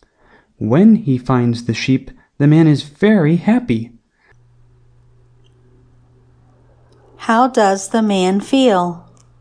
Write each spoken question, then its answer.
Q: How does the man feel?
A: The man is happy.